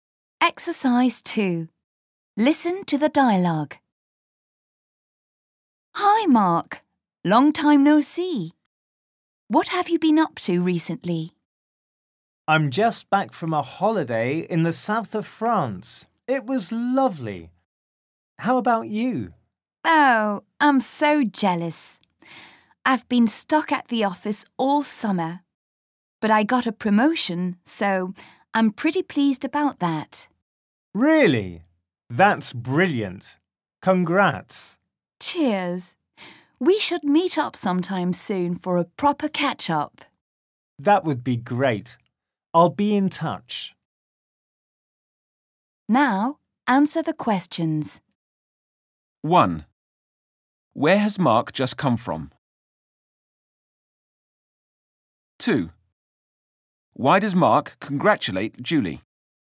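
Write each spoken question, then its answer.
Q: Where has Mark just come from?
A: A holiday in the south of France

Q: Why does Mark congratulate Julie?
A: She got a promotion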